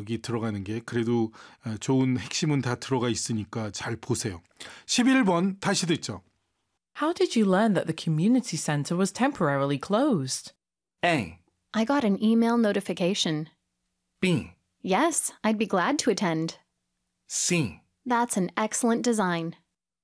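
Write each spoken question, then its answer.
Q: How did you learn that the community center was temporarily closed?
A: A: I got an email notification.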